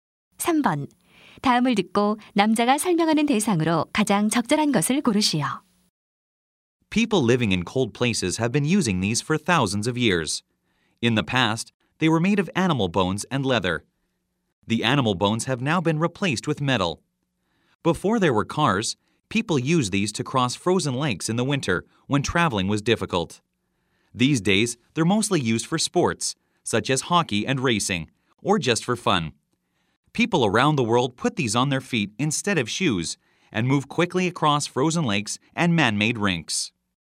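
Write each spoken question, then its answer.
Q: 다음을 듣고 남자가 설명하는 대상으로 가장 적절한 것을 고르시오.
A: 스케이트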